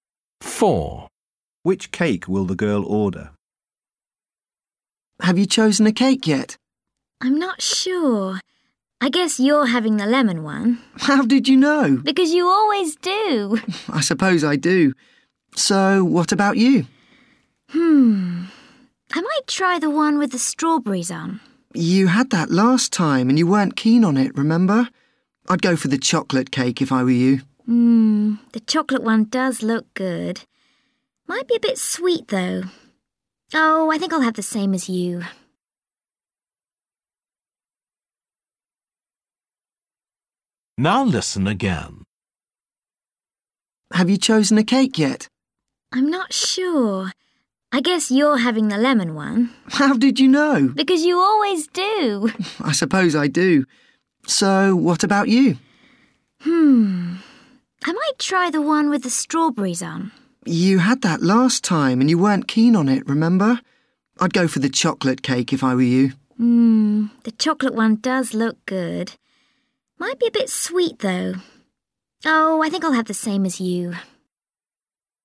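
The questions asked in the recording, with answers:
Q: Which cake will the girl order?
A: the lemon cake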